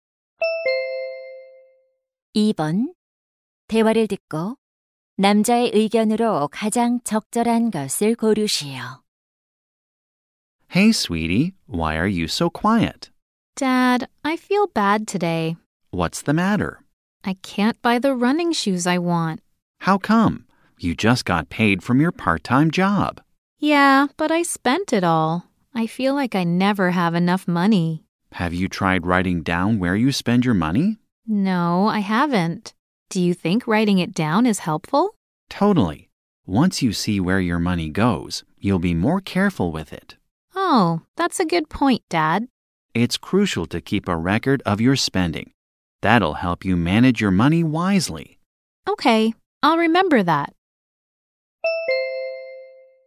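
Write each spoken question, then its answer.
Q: 대화를 듣고 남자의 의견으로 가장 적절한 것을 고르시오.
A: 지출 내역을 기록하는 것이 돈 관리에 도움이 된다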